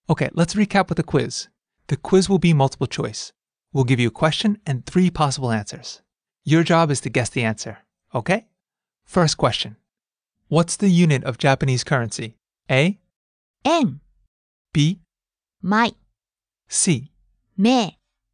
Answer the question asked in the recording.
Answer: A. 円